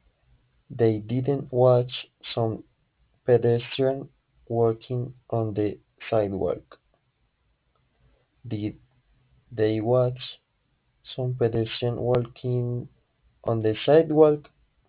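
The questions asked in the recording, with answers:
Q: Did they watch some pedestrian walking on the sidewalk?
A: No, they didn't.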